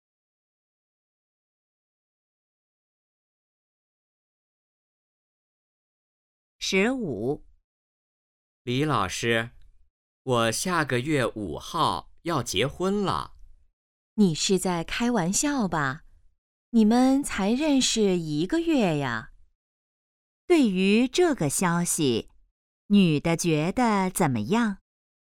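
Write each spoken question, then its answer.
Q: 女的觉得怎么样?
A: 不相信,很吃惊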